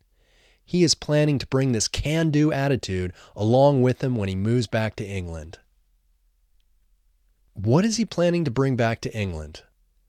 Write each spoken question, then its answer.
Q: What is he planning to bring back to England?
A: He is planning to bring this can-do attitude back to England.